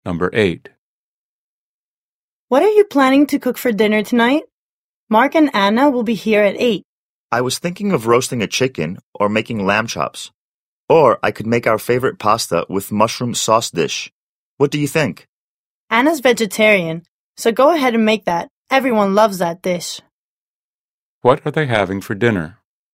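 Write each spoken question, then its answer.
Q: What are they having for dinner?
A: Pasta with mushroom sauce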